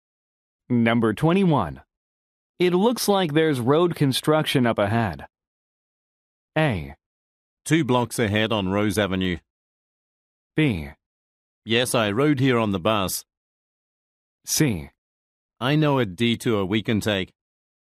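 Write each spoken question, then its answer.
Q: It looks like there's road construction up ahead.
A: C: I know a detour we can take.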